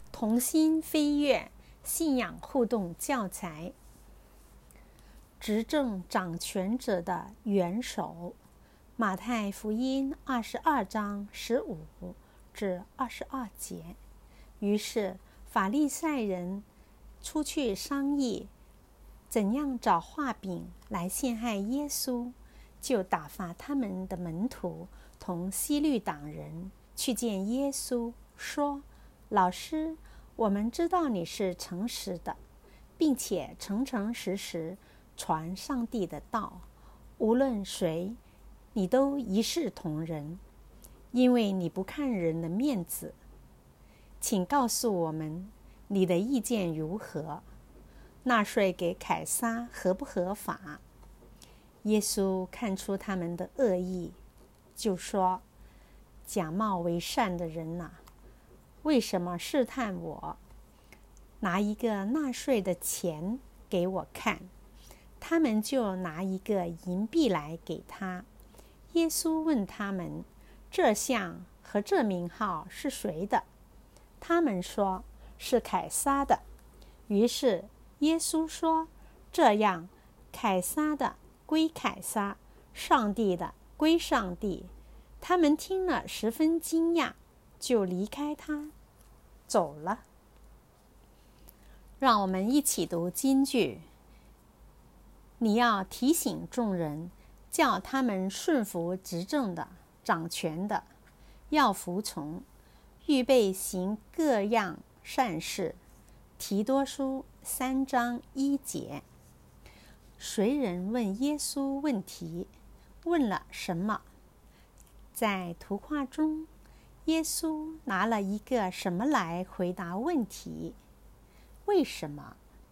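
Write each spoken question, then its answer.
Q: 谁人问耶稣问题?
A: 法利赛人的门徒和希律党人

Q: 问了什么?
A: 纳税给凯撒合不合法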